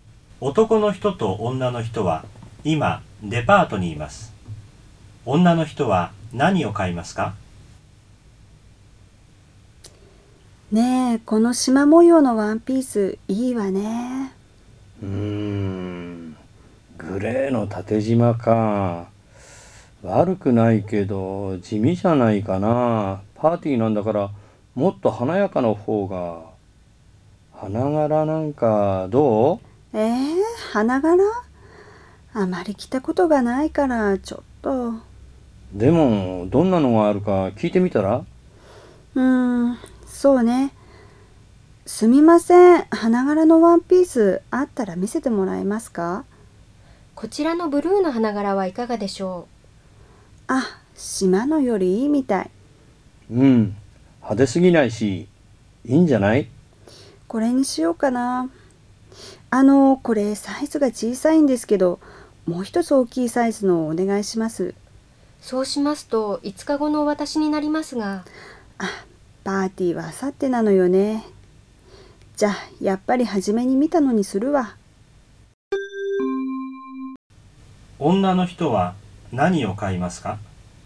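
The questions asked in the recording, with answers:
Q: 女の人は何を買いますか?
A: グレーの縦縞のワンピース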